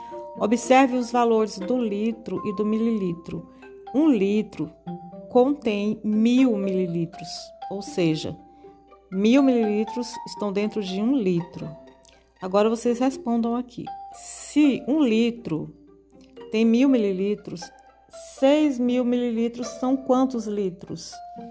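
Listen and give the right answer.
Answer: 6 litros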